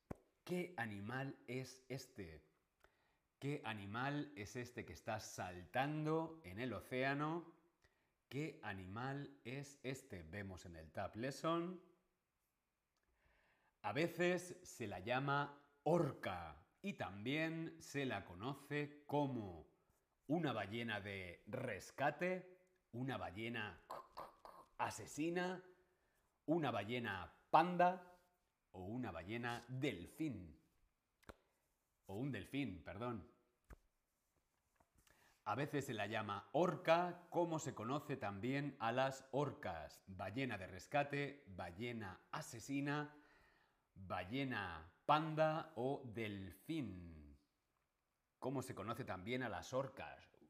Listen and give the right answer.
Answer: Es una ballena asesina.